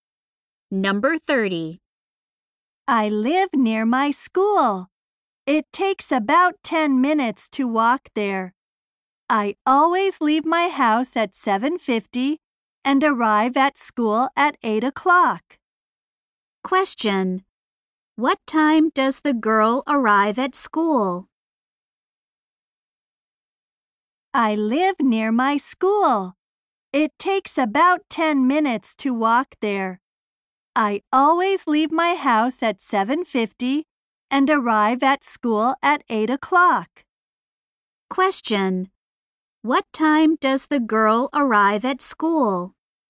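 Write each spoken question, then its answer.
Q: What time does the girl arrive at school?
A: At 8 o'clock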